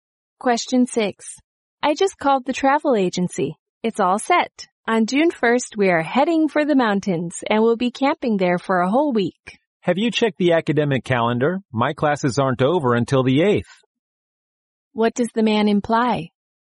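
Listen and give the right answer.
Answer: He can't go on June 1st because his classes aren't over until the 8th.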